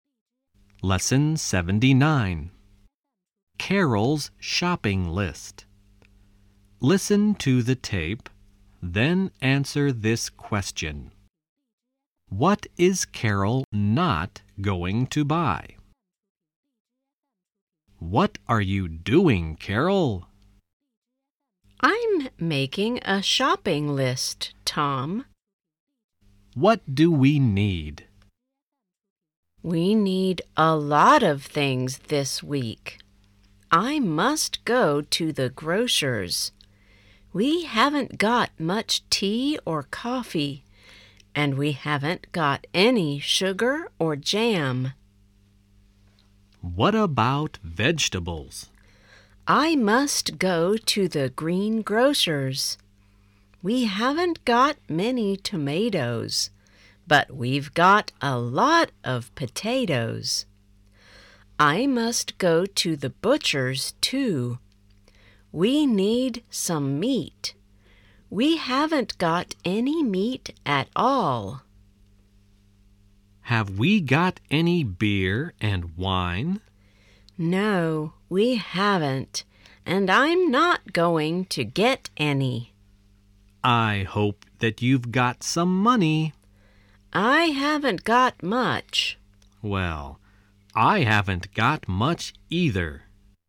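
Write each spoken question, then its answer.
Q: What is Carol not going to buy?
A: Beer and wine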